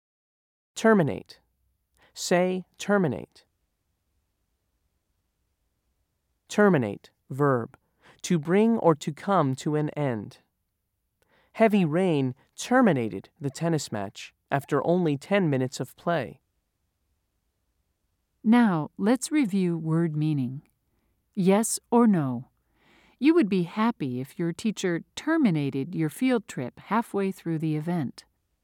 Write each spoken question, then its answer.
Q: Yes or no? You would be happy if your teacher terminated your field trip halfway through the event.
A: If you said no, you were correct.